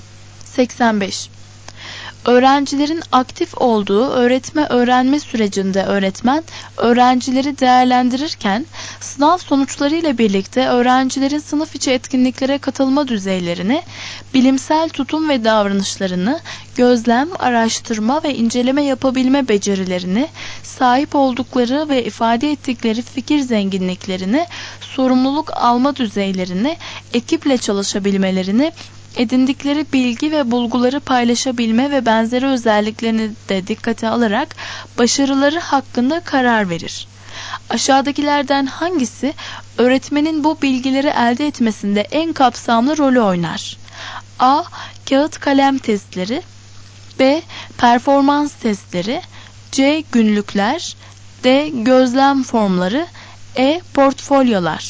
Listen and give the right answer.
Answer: Doğru cevap E.